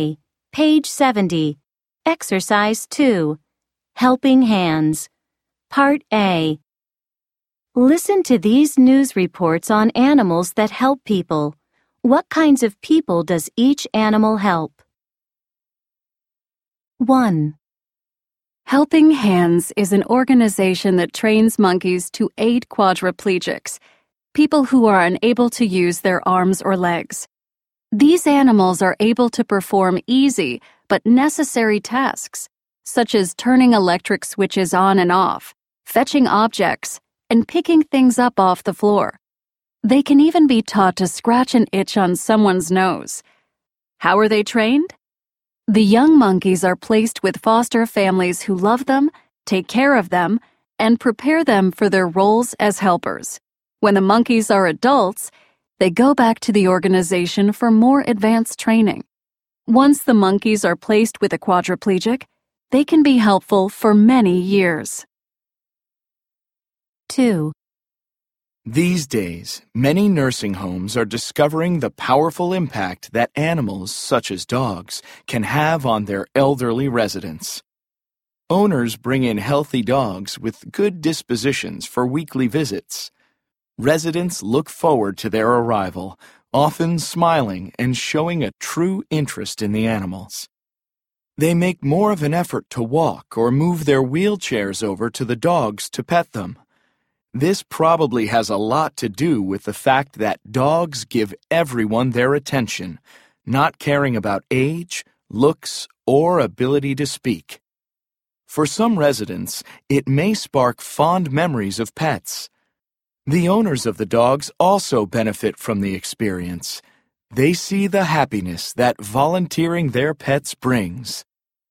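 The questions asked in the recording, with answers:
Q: What kinds of people does each animal help?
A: Monkeys help quadriplegics, people who can't use their arms or legs

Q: What kinds of people does each animal help?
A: Dogs help elderly residents of nursing homes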